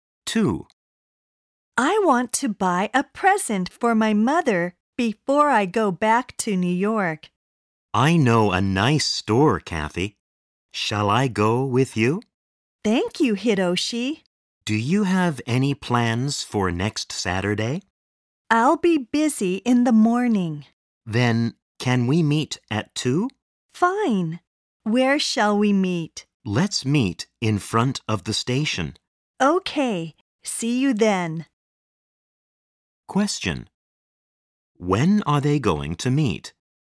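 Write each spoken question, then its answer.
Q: When are they going to meet?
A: At 2 (in the afternoon) next Saturday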